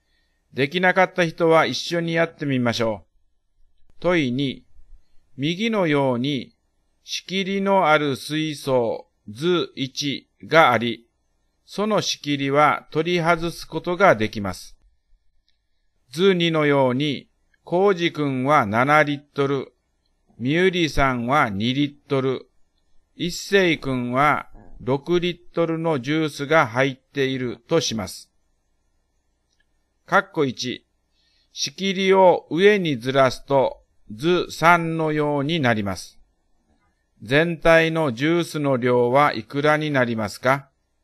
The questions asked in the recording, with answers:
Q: 全体のジュースの量はいくらになりますか?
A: 全体の量は15リットルになりますね